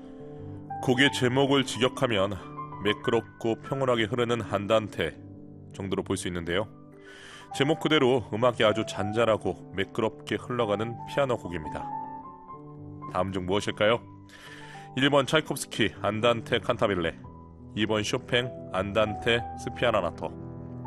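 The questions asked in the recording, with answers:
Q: 다음 중 무엇일까요? 1번 차이콥스키 안단테 칸타빌레, 2번 쇼팽 안단테 스피아나나토.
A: 2: 쇼팽 안단테 스피아나나토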